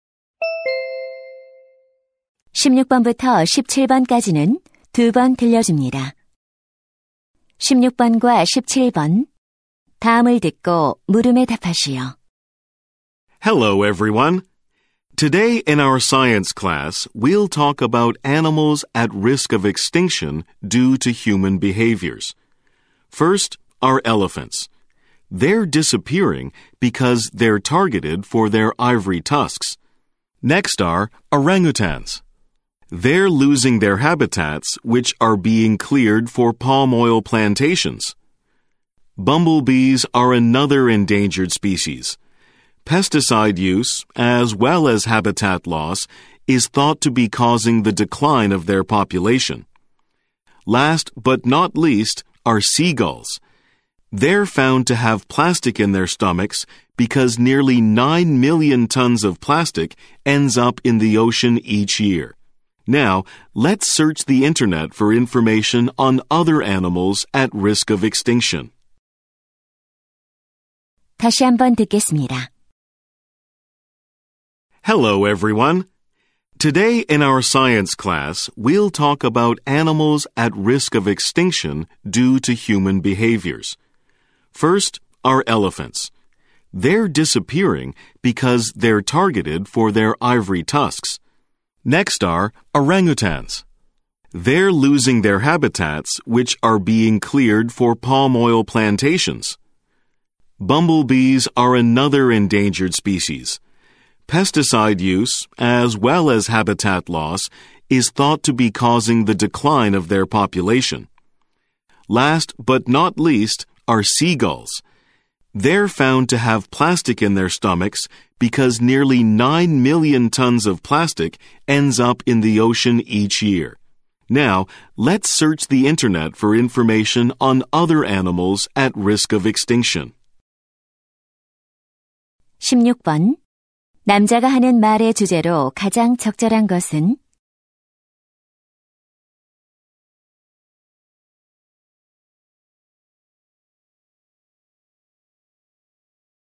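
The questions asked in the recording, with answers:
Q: 남자가 하는 말의 주제로 가장 적절한 것은?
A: 인간의 행동 때문에 멸종 위기에 처한 동물들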